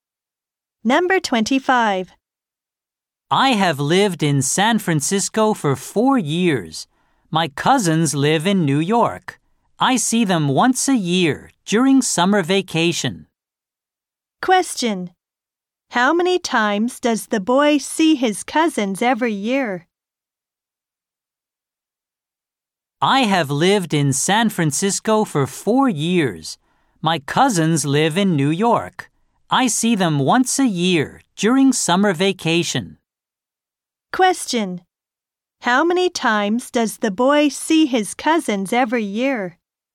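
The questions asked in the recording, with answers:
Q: How many times does the boy see his cousins every year?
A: Once a year.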